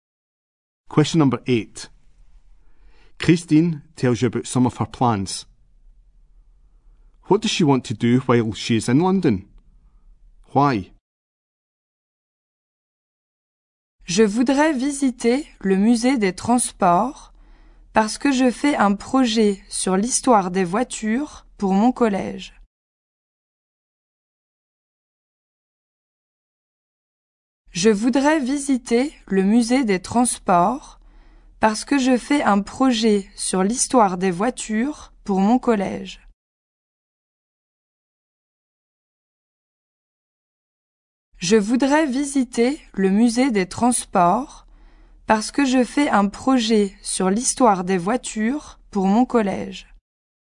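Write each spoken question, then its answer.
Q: What does she want to do while she is in London?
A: Visit the transport museum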